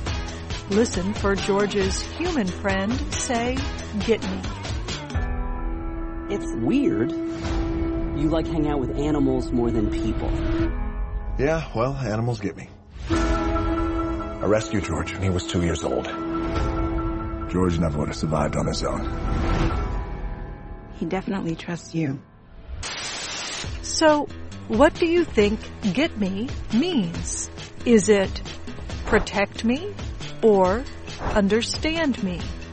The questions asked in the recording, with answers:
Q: So, what do you think get me means?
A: Get me means understand me.